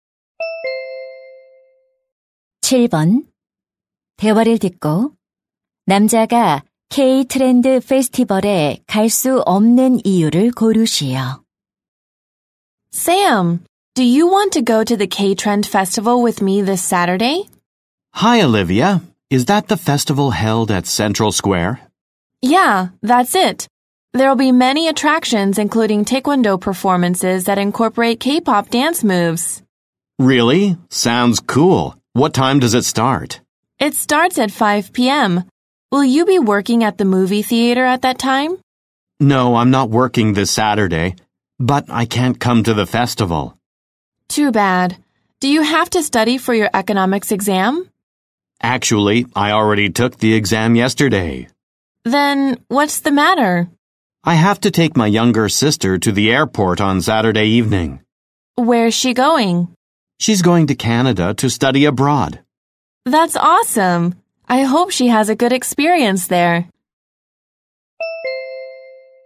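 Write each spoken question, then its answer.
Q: 대화를 듣고 남자가 K-트렌드 페스티벌에 갈 수 없는 이유를 고르시오.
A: 여동생을 공항에 데려다줘야 해서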